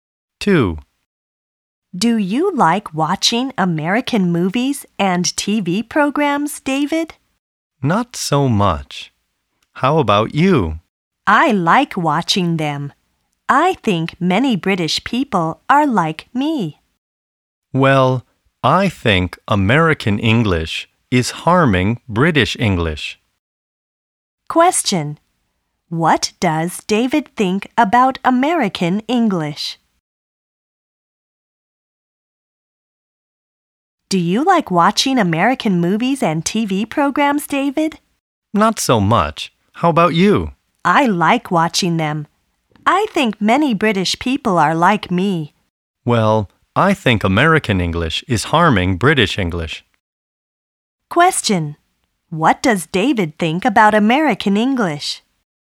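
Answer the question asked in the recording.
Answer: It is harming British English.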